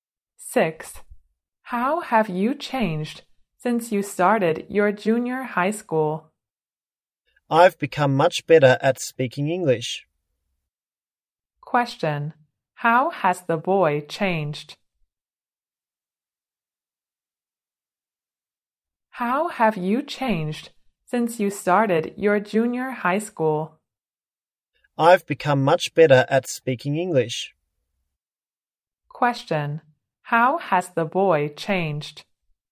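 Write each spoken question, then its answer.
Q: How has the boy changed?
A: He has become much better at speaking English.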